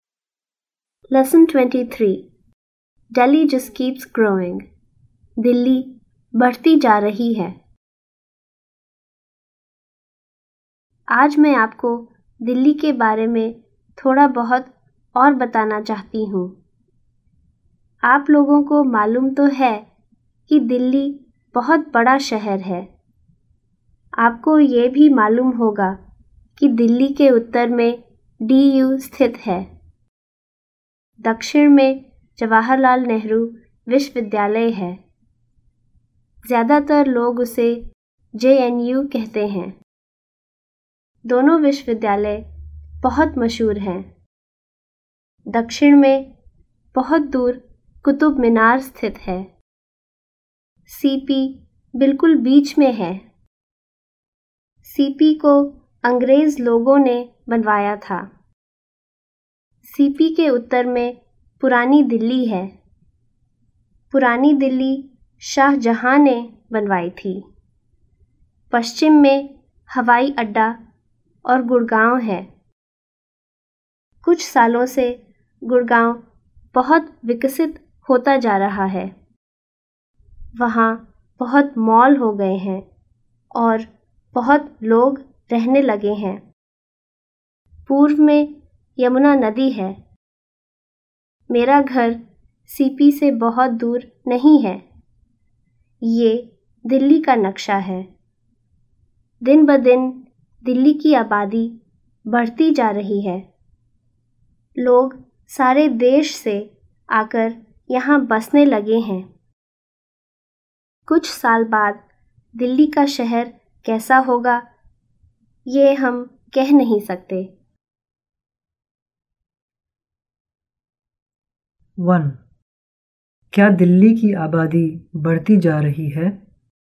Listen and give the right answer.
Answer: जी हाँ, वो बढ़ती जा रही है.